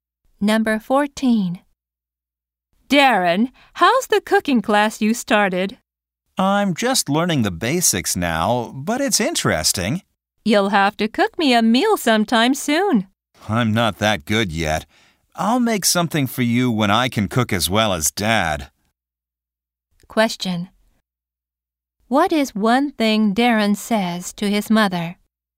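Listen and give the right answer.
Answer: He is not good at cooking yet.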